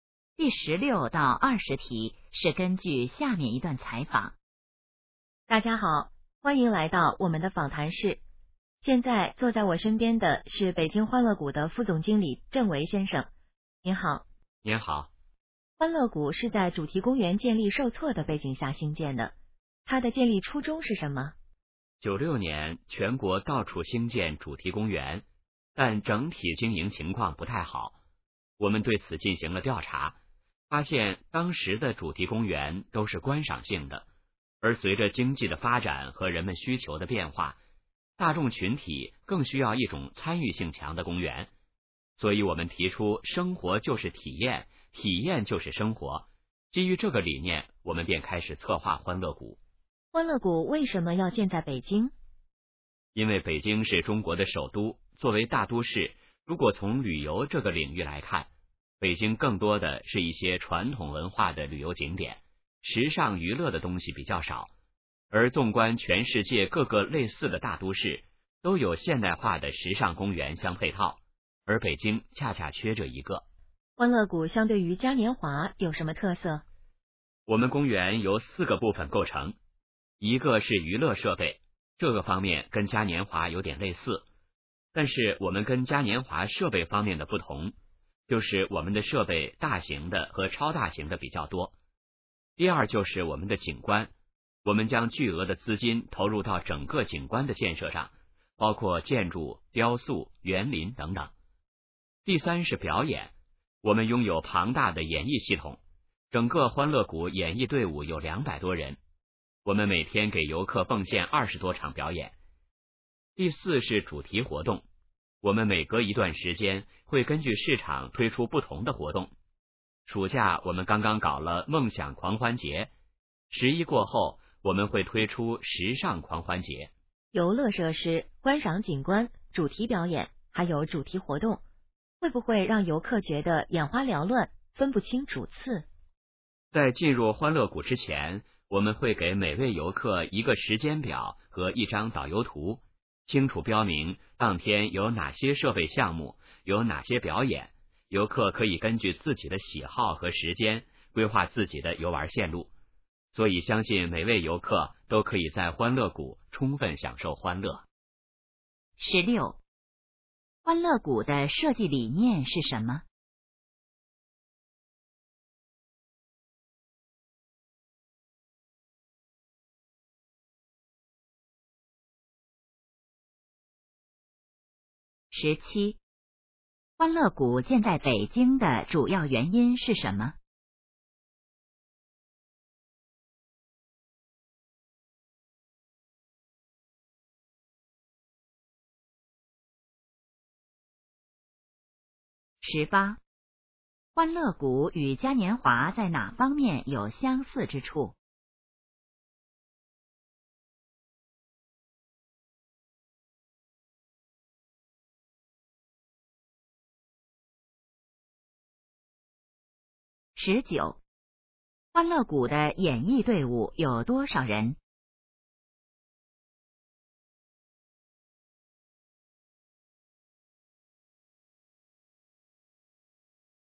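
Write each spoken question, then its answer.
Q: 欢乐谷的设计理念是什么?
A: 生活就是体验,体验就是生活

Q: 欢乐谷建在北京的主要原因是什么?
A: 北京缺少现代化的时尚娱乐公园

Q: 欢乐谷与嘉年华在哪方面有相似之处?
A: 娱乐设备

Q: 欢乐谷的演艺队伍有多少人?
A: 200多人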